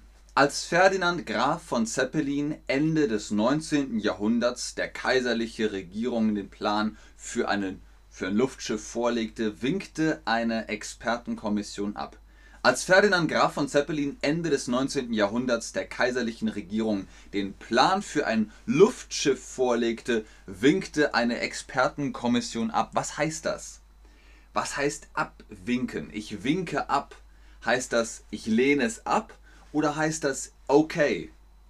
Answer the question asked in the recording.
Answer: Abwinken heißt, mm, nein,